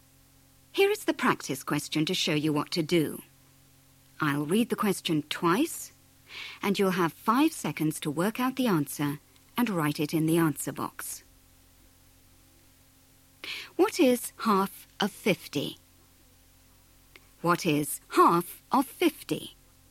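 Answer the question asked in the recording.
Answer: 25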